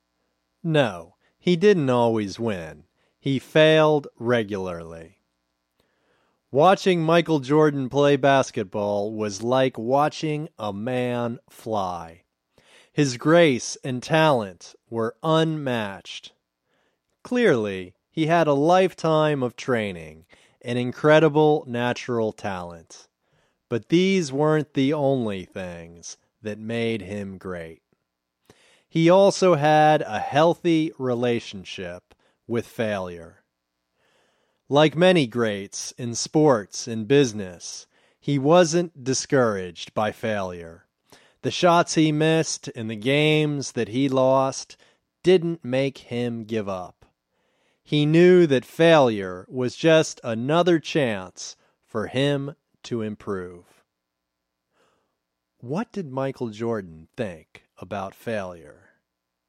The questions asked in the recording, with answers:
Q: What did Michael Jordan think about failure?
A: He thought that failure was just another chance for him to improve.